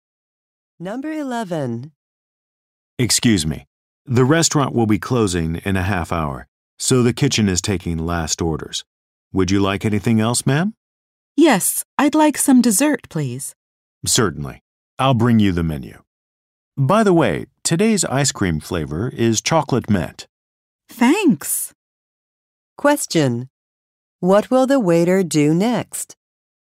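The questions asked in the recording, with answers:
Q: What will the waiter do next?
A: Bring the dessert menu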